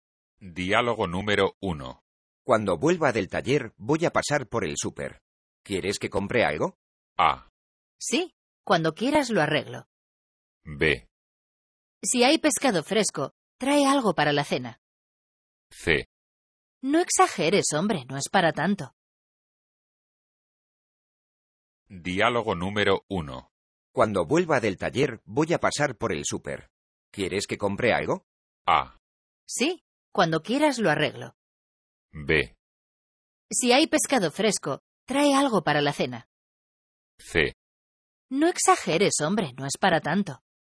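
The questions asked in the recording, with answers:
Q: ¿Quieres que compre algo?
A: B: Si hay pescado fresco, trae algo para la cena.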